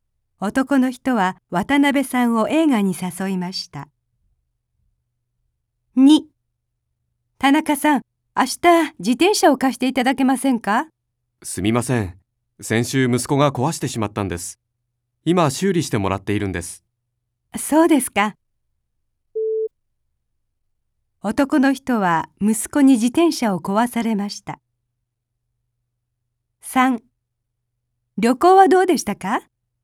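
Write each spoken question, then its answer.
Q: 男の人は息子に自転車を壊されました。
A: はい(正しい)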